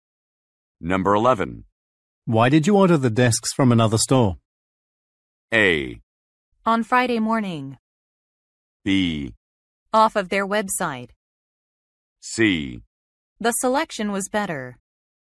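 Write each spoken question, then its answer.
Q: Why did you order the desks from another store?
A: C: The selection was better.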